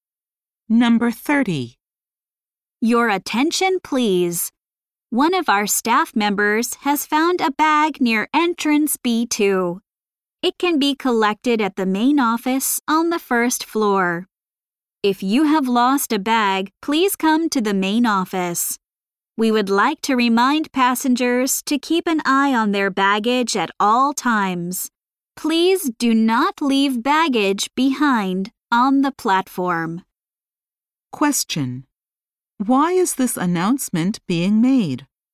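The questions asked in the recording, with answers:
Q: Why is this announcement being made?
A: A staff member found a bag near entrance B2.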